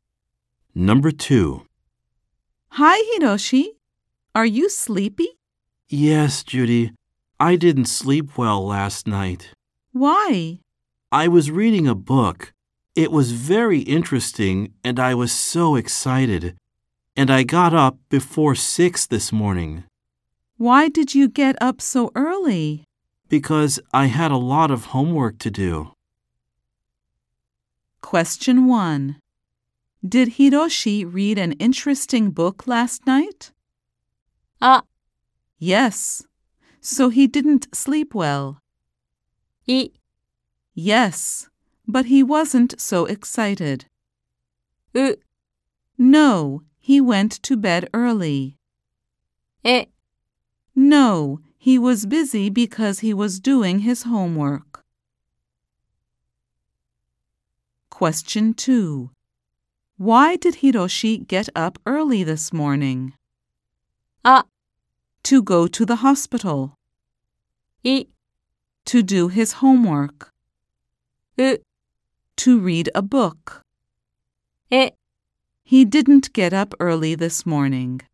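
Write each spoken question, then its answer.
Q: Did Hiroshi read an interesting book last night?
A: あ: Yes. So he didn't sleep well.

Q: Why did Hiroshi get up early this morning?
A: い: To do his homework.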